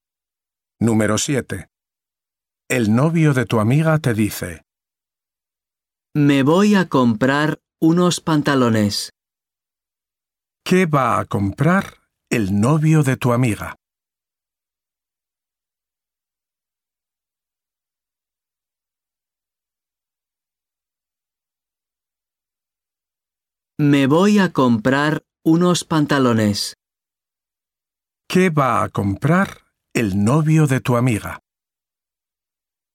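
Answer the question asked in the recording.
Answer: Unos pantalones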